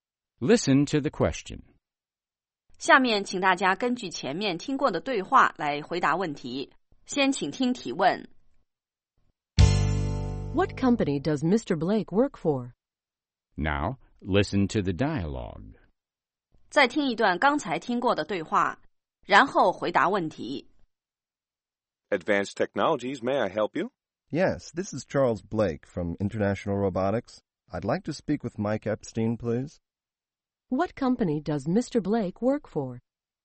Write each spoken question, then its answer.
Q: What company does Mr. Blake work for?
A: He works for International Robotics.